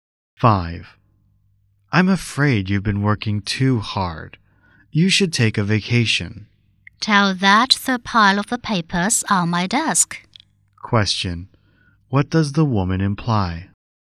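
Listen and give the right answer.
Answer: She has too much work to take a vacation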